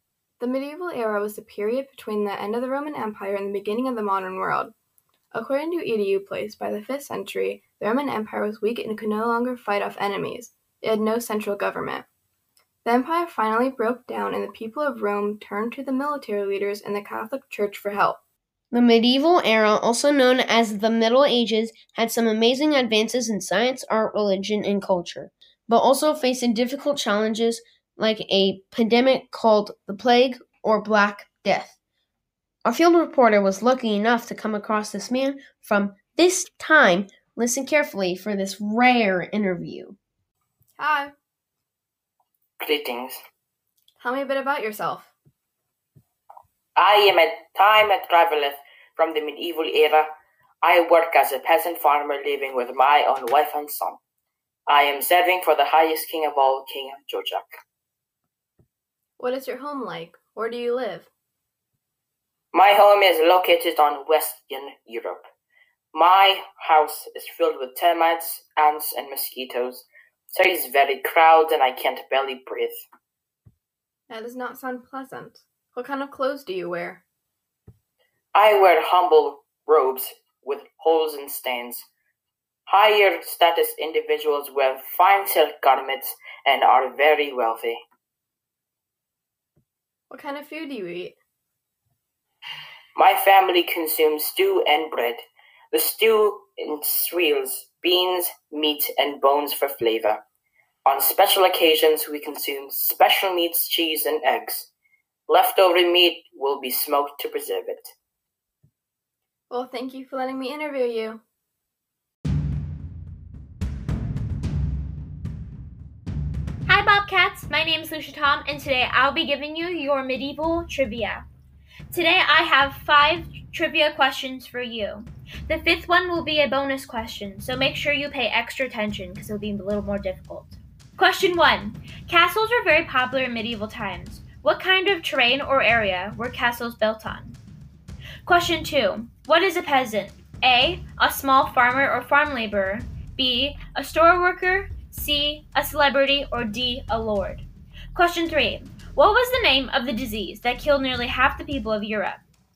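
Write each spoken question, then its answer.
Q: What is a peasant? A. A small farmer or farm laborer. B. A store worker. C. A celebrity. Or D. A lord.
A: A: A small farmer or farm laborer.

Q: What was the name of the disease that killed nearly half the people of Europe?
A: The plague (Black Death)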